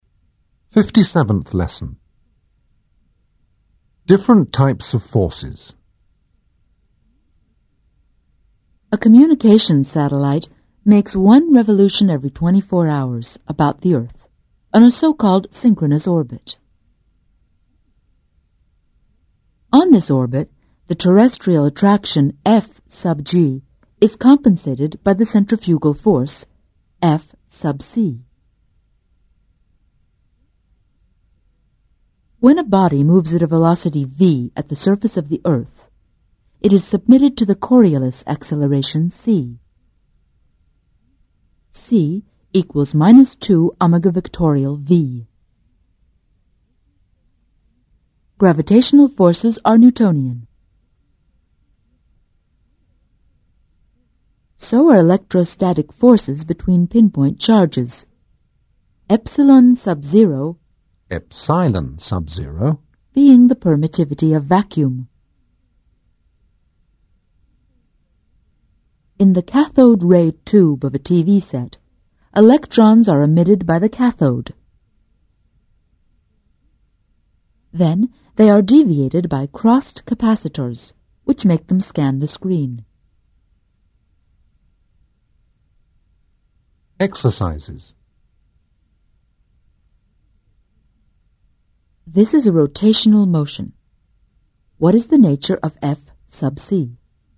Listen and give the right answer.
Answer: F sub C is the centrifugal force.